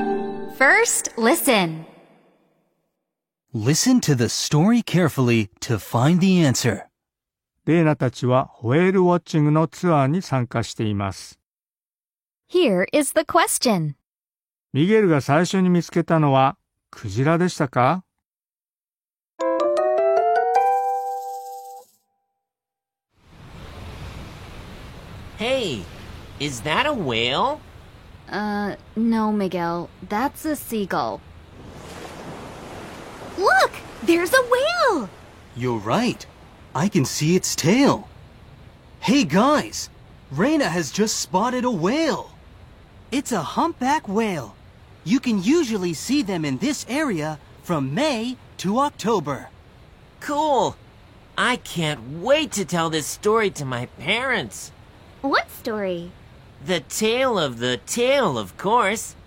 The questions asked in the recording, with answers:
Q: ミゲルが最初に見つけたのはクジラでしたか?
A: 答えは違いますよ。